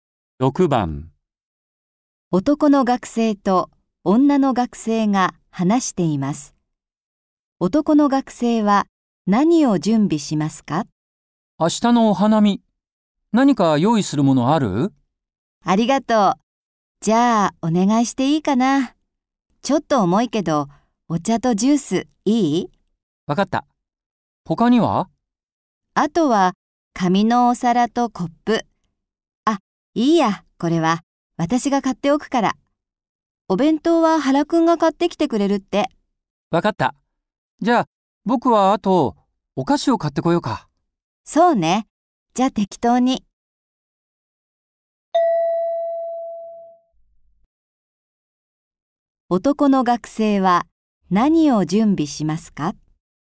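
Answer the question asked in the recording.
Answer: お茶とジュースとお菓子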